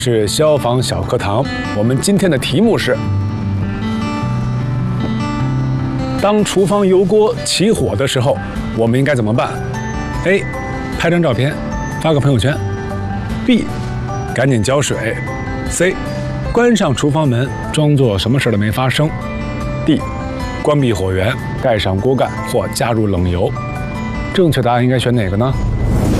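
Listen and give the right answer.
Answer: D: 关闭火源,盖上锅盖或加入冷油。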